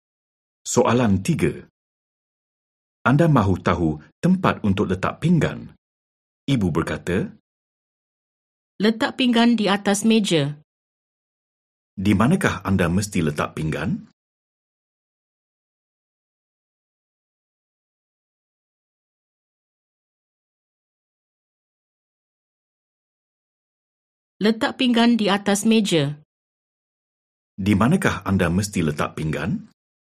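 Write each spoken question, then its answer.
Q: Di manakah anda mesti letak pinggan?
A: Di atas meja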